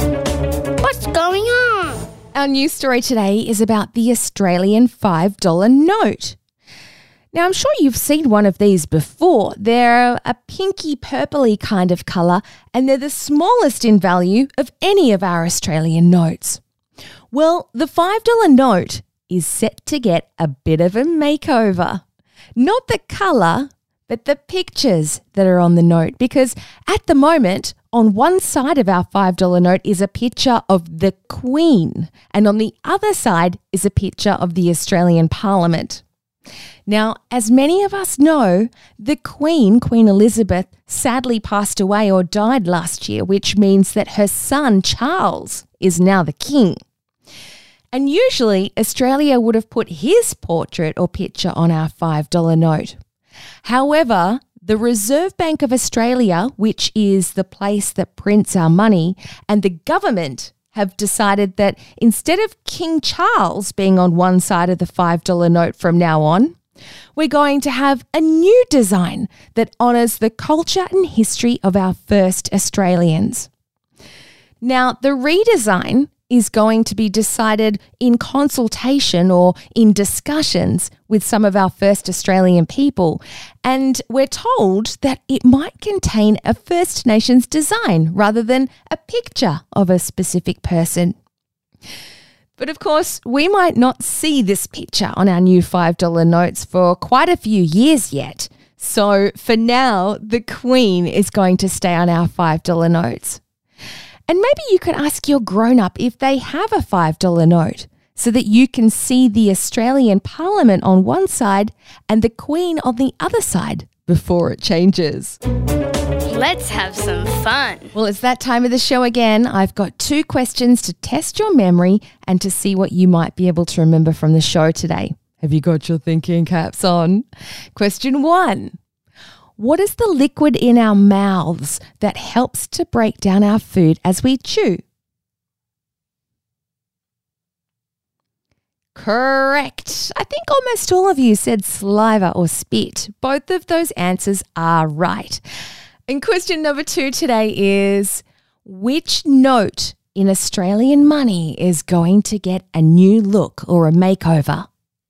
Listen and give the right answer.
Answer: For those that said the $5 note, I know you had your listening ears on.